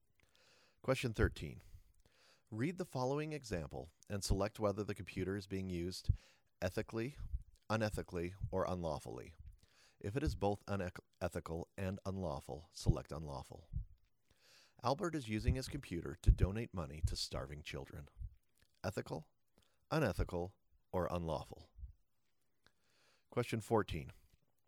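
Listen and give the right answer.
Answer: ethical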